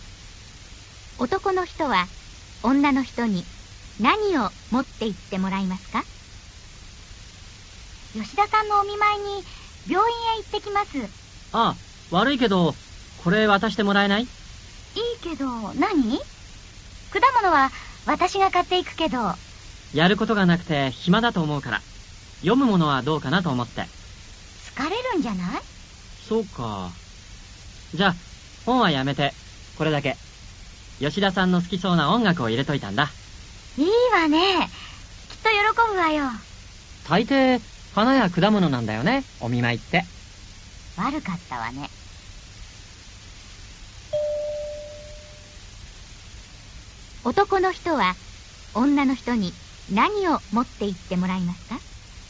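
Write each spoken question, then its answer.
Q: 男の人は女の人に何を持って行ってもらいますか?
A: 音楽(を入れたもの)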